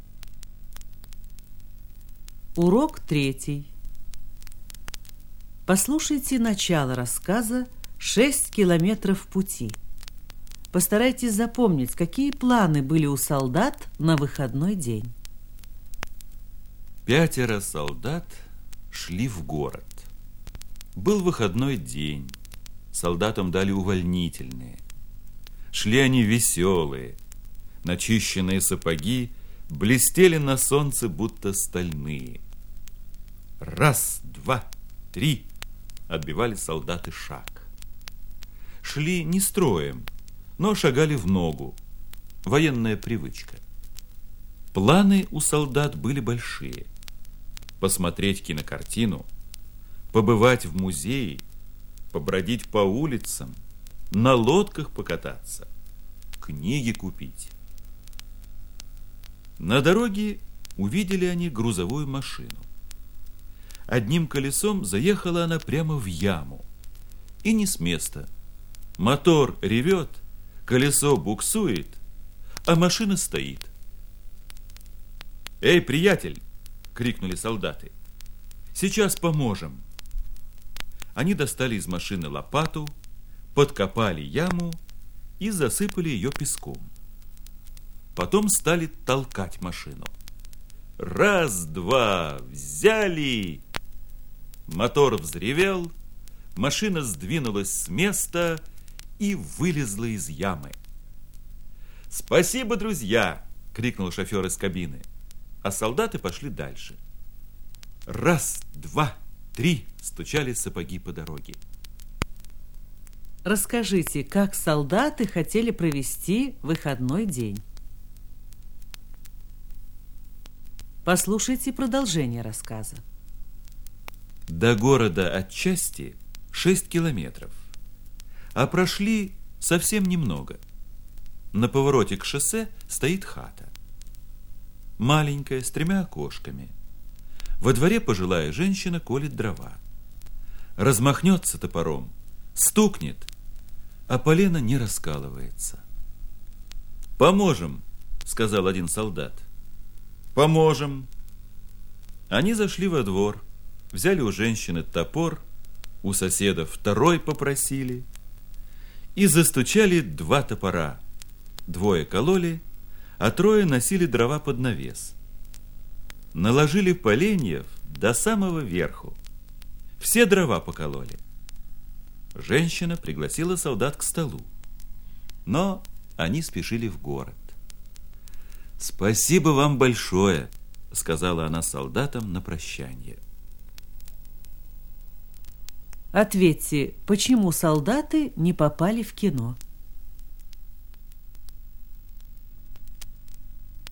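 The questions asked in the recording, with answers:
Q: Расскажите, как солдаты хотели провести выходной день?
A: Посмотреть кинокартину, побывать в музее, побродить по улицам, покататься на лодках, купить книги

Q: Ответьте, почему солдаты не попали в кино?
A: Они помогали людям: вытолкнули машину из ямы, накололи дрова пожилой женщине, и у них не осталось времени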